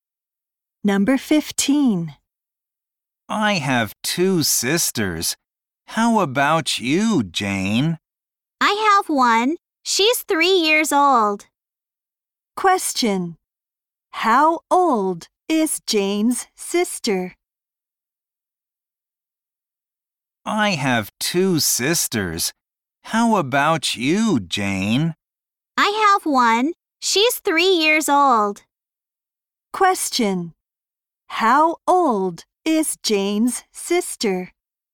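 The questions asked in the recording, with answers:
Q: Question. How old is Jane's sister?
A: 3 years old.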